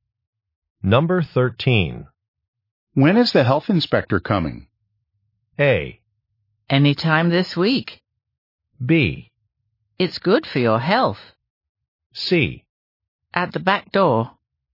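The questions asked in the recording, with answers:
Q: When is the health inspector coming?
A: A: Anytime this week.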